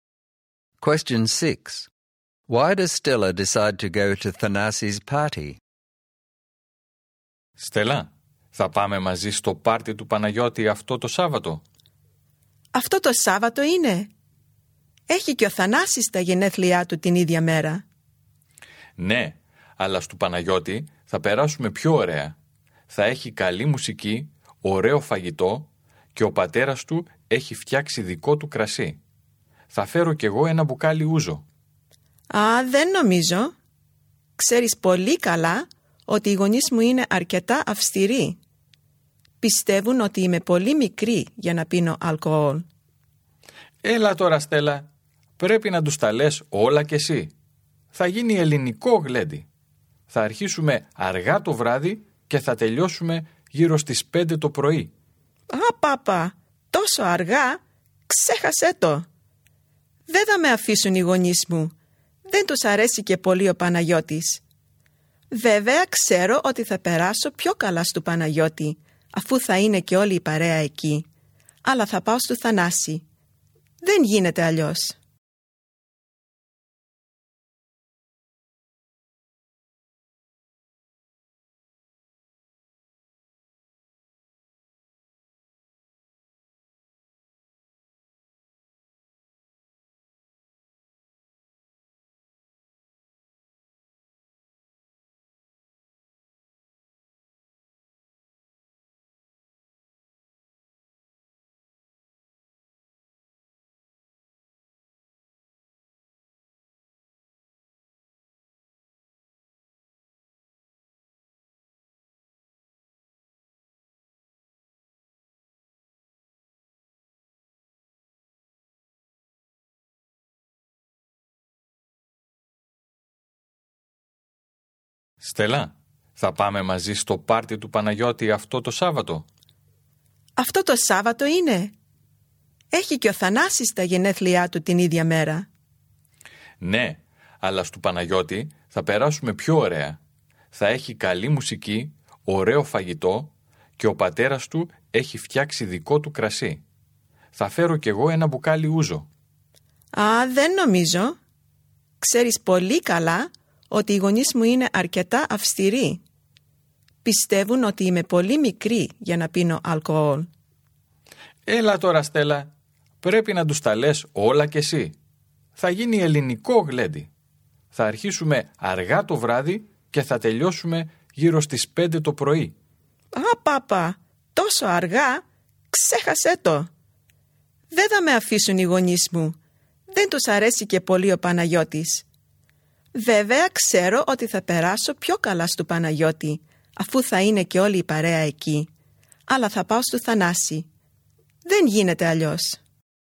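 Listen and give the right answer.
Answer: Her strict parents won't let her go to Panagiotis' party: there will be alcohol, it ends at 5 a.m., and they don't like Panagiotis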